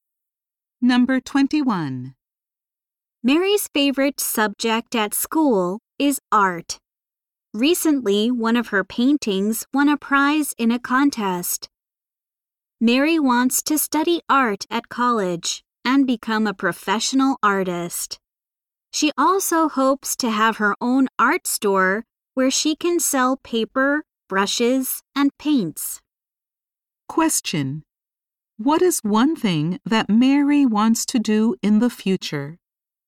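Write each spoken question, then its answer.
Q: What is one thing that Mary wants to do in the future?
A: Become a professional artist or have her own art store.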